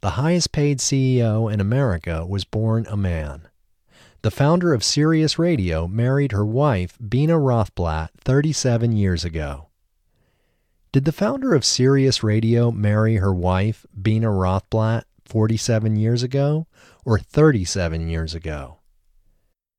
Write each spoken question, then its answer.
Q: Did the founder of Sirius Radio marry her wife, Bina Rothblatt, 47 years ago or 37 years ago?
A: The founder of Sirius Radio married Bina Rothblatt 37 years ago.